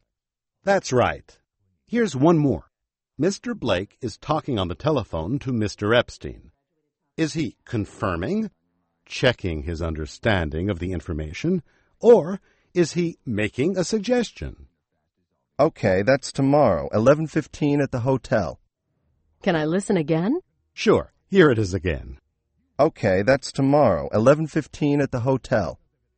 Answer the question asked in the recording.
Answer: He's confirming. He's confirming the information.